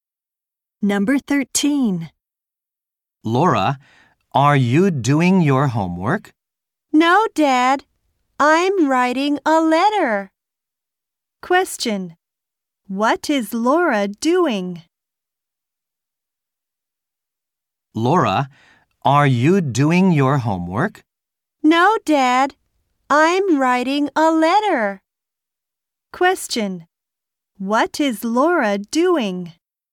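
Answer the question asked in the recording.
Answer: Writing a letter.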